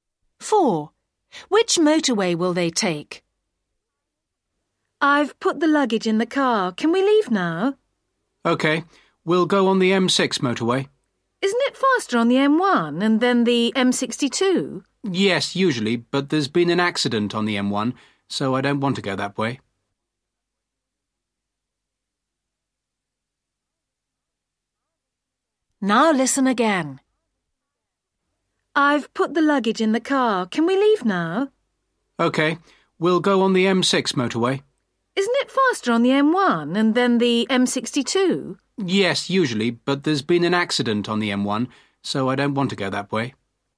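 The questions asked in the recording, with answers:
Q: Which motorway will they take?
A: The M6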